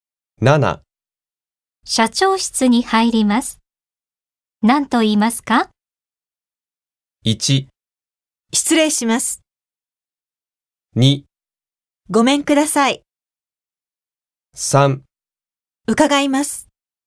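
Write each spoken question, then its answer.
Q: 社長室に入ります。何と言いますか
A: 1: 失礼します。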